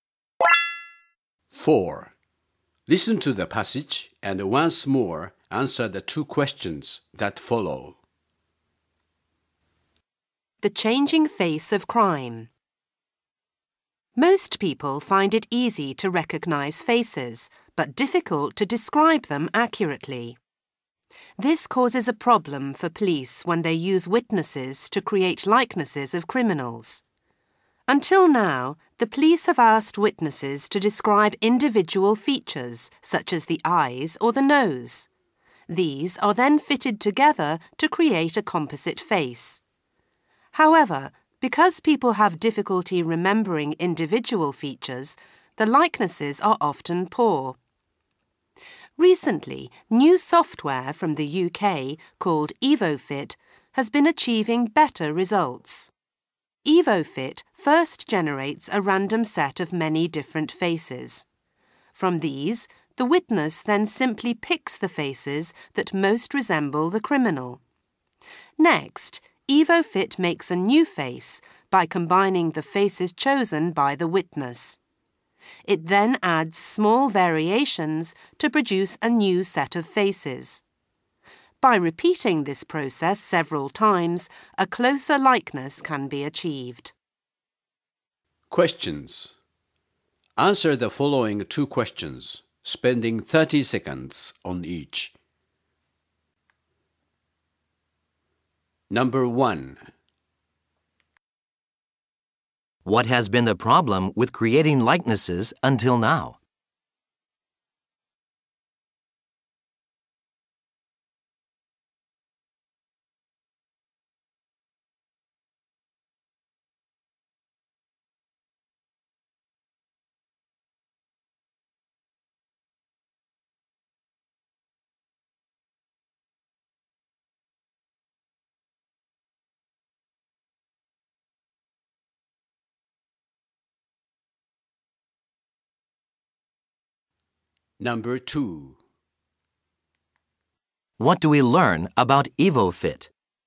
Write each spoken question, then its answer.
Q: What has been the problem with creating likenesses until now?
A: While people can often remember a face, they have great difficulty in describing it accurately to law enforcement officers.

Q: What do we learn about EvoFit?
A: A British company has designed software called EvoFit, which combines faces similar to that described by witnesses.